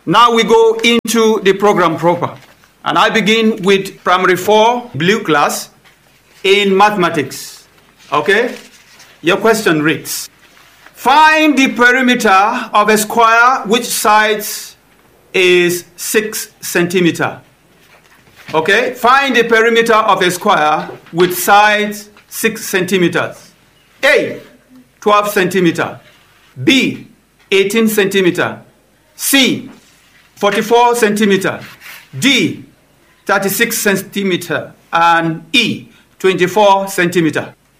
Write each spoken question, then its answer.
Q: find the perimeter of a square which sides is 6 centimeters.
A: Yes, it's 24 centimeters.